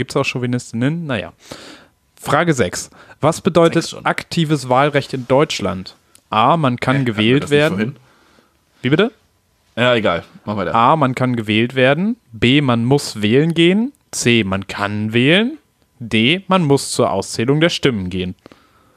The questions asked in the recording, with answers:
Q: Was bedeutet aktives Wahlrecht in Deutschland?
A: Und aktives ist, man kann wählen.